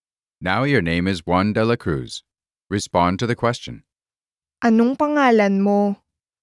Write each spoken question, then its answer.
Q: Anong pangalan mo?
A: Ang pangalan ko ay Juan de la Cruz.